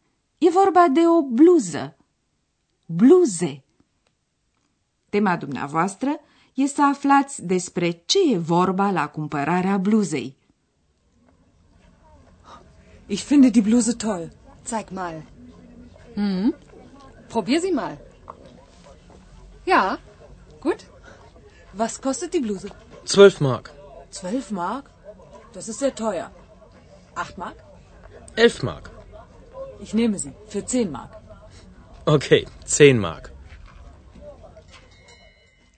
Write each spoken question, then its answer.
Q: Tema dumneavoastră e să aflați despre ce e vorba la cumpărarea bluzei.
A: E o scenă tipică de talcioc.